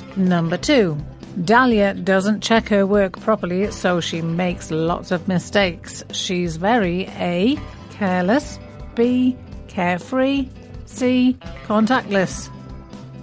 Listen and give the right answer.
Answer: And the answer is A, careless.